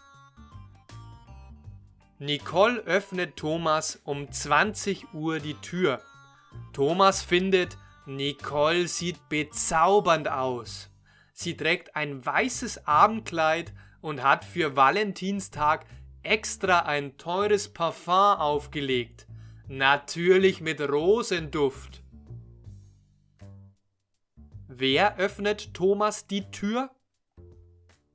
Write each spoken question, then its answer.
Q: Wer öffnet Thomas die Tür?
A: Nicole.